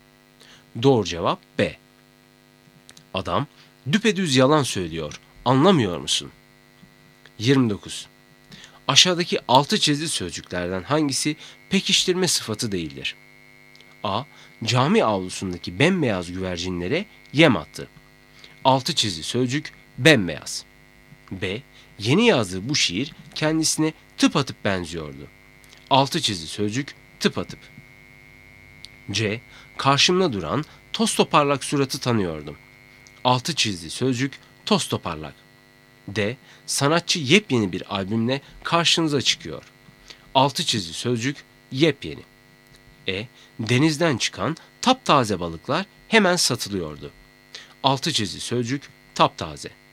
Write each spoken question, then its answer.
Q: Aşağıdaki altı çizgi sözcüklerden hangisi pekiştirme sıfatı değildir?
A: Doğru cevap B. Yeni yazdığı bu şiir kendisine tıp atıp benziyordu.